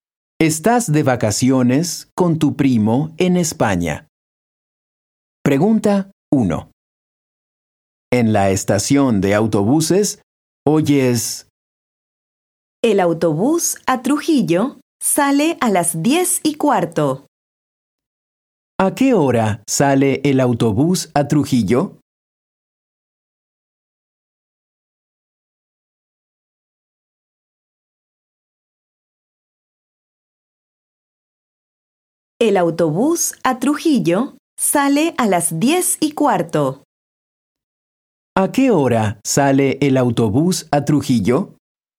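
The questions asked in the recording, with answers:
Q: ¿A qué hora sale el autobús a Trujillo?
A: A las 10:15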